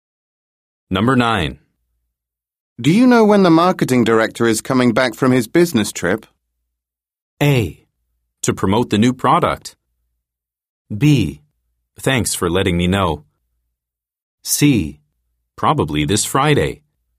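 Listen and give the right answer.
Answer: C: Probably this Friday.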